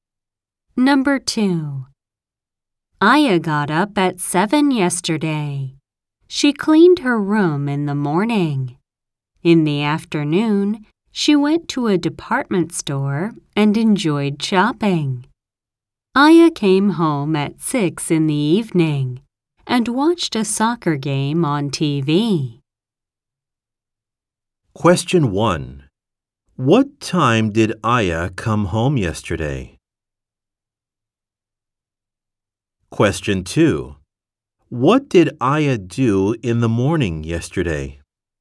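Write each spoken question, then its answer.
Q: What time did Aya come home yesterday?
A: At 6 in the evening

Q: What did Aya do in the morning yesterday?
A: She cleaned her room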